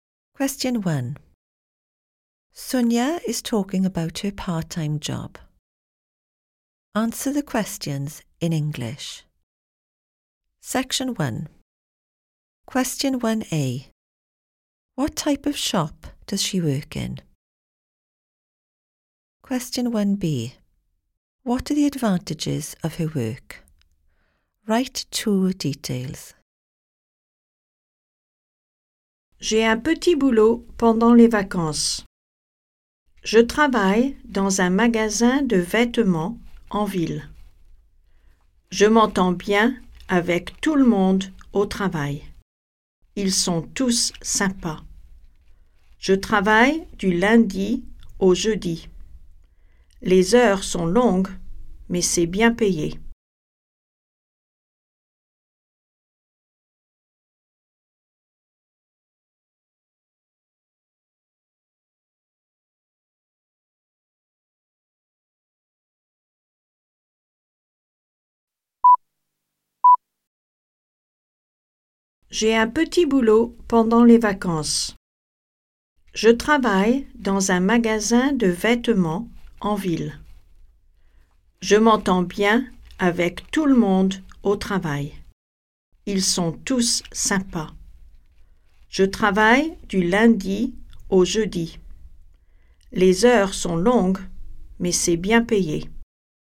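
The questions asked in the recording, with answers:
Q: What type of shop does she work in?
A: A clothes shop

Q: What are the advantages of her work?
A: She gets on well with everyone / they are all nice; it is well paid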